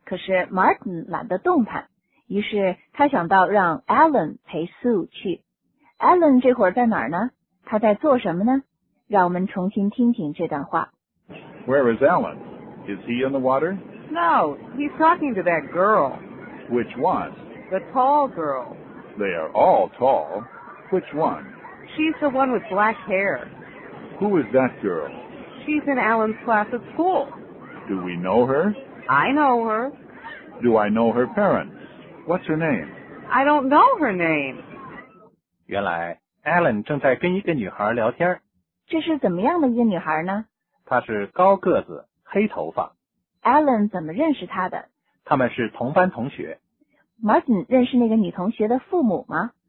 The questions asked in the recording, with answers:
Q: 这是怎么样的一个女孩呢?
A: 她是高个子,黑头发。

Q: Alan 怎么认识她的?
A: 他们是同班同学。